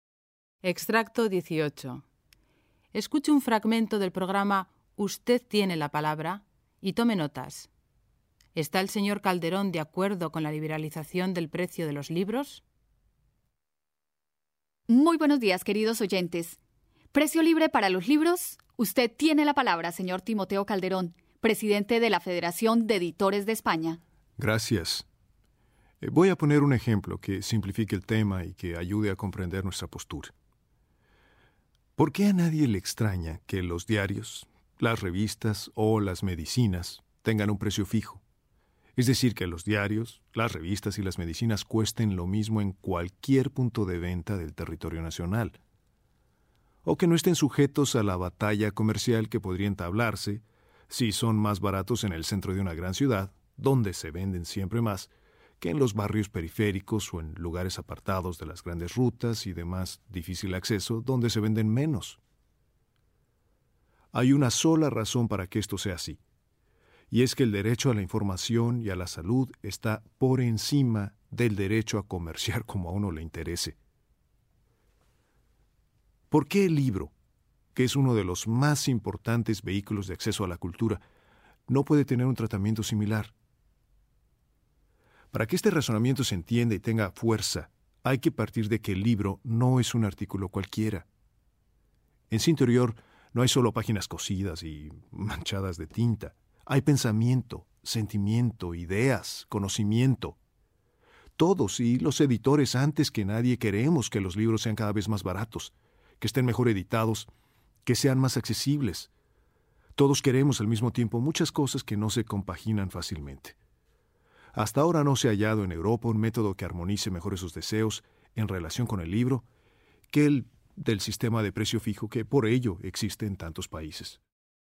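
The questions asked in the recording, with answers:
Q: ¿Está el señor Calderón de acuerdo con la liberalización del precio de los libros?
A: No, está a favor del sistema de precio fijo.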